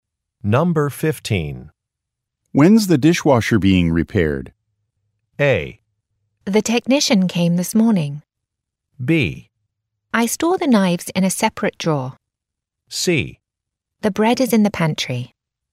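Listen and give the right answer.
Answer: A: The technician came this morning.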